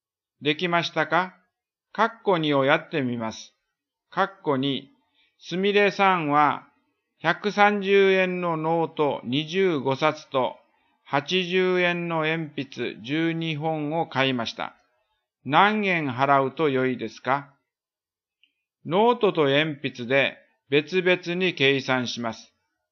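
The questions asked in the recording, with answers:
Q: 何円払うと良いですか?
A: 4210円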